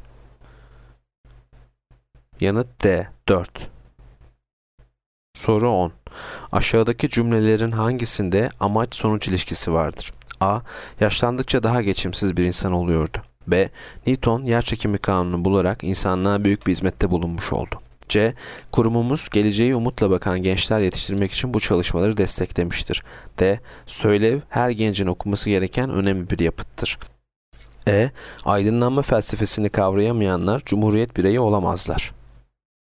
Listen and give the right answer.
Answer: Yanıt C. Kurumumuz geleceğe umutla bakan gençler yetiştirmek için bu çalışmaları desteklemiştir.